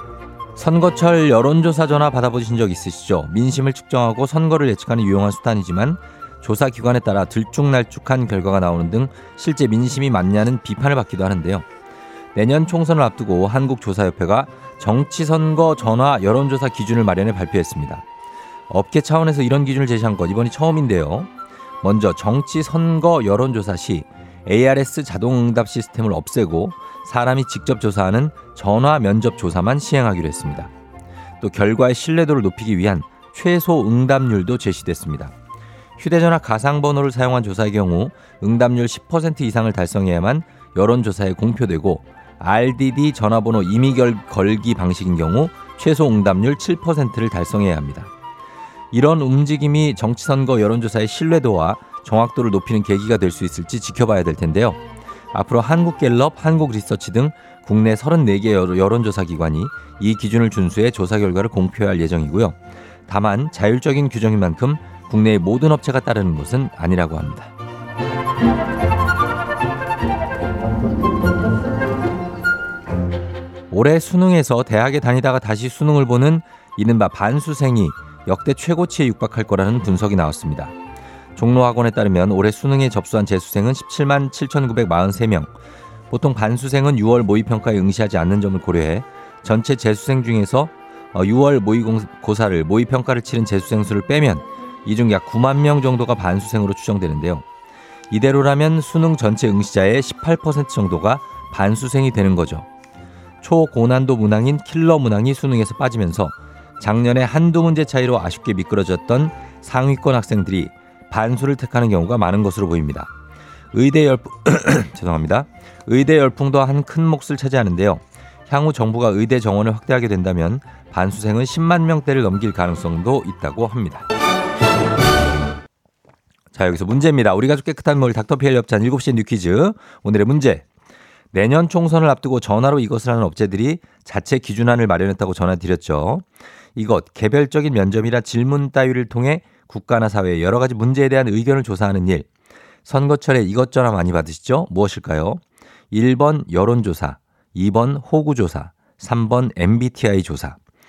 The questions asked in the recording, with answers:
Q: 오늘의 문제. 내년 총선을 앞두고 전화로 이것을 하는 업체들이 자체 기준안을 마련했다고 전화드렸죠. 이것 개별적인 면접이나 질문 따위를 통해 국가나 사회의 여러 가지 문제에 대한 의견을 조사하는 일. 선거철에 이것저것 많이 받으시죠? 무엇일까요? 1번 여론조사, 2번 호구조사, 3번 MBTI 조사.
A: 정답은 1번 여론조사입니다.